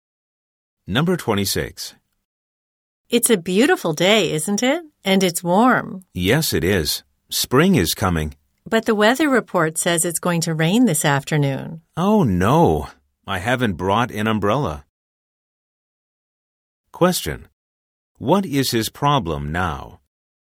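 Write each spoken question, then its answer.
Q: What is his problem now?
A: He hasn't brought an umbrella, and it will rain this afternoon.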